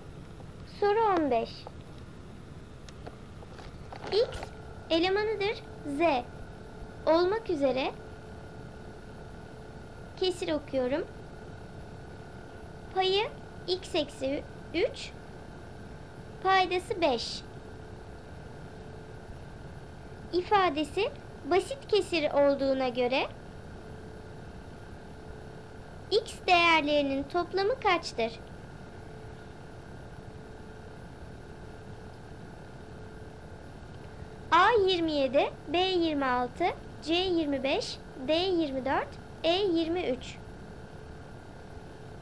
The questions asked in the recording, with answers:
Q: x değerlerinin toplamı kaçtır?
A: Doğru cevap A 27.